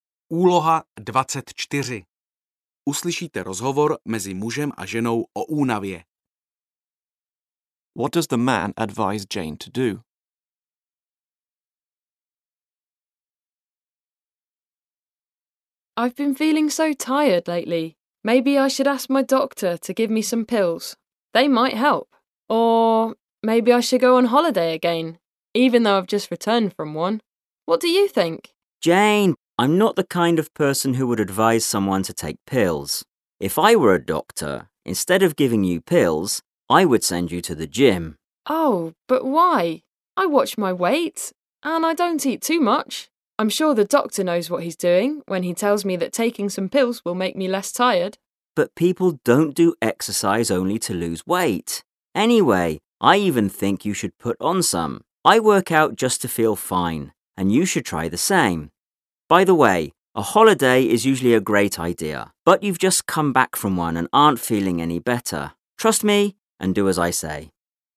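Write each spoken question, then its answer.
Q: What does the man advise Jane to do?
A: Exercise at the gym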